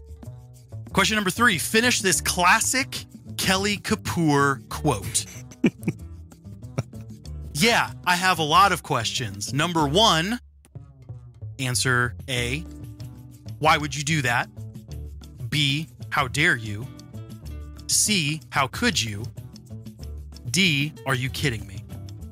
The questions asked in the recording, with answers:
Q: Finish this classic Kelly Kapoor quote.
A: That would be B. How dare you?